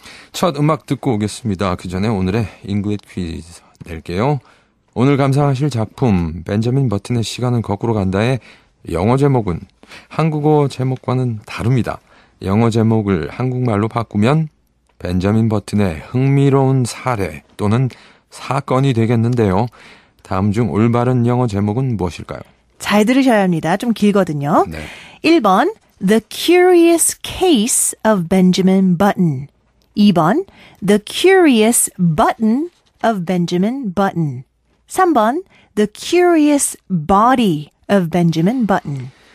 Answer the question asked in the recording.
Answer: 네, 정답은 1번 The Curious Case of Benjamin Button이었습니다.